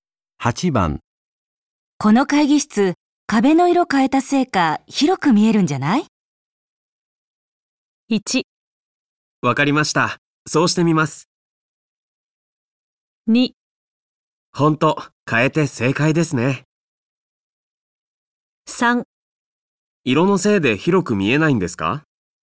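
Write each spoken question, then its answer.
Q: この会議室、壁の色変えたせいか広く見えるんじゃない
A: 2: ほんと、変えて正解ですね。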